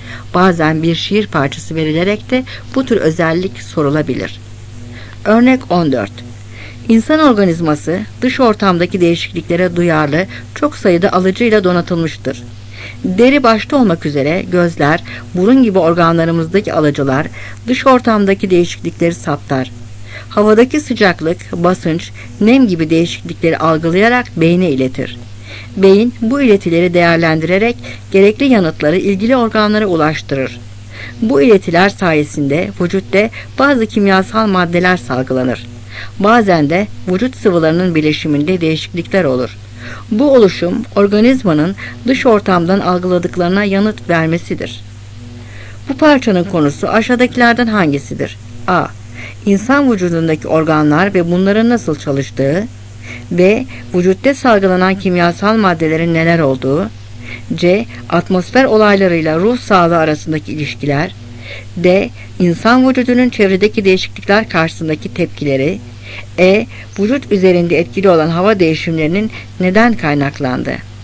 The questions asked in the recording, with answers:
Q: Bu parçanın konusu aşağıdakilerden hangisidir?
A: Cevap D.